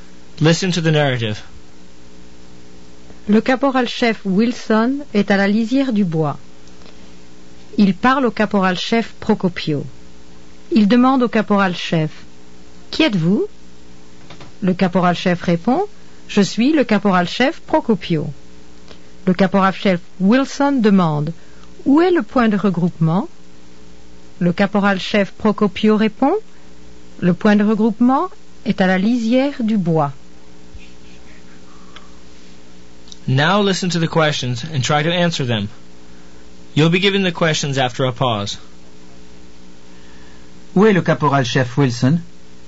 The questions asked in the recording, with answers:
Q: Où est le caporal-chef Wilson?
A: Le caporal-chef Wilson est à la lisière du bois.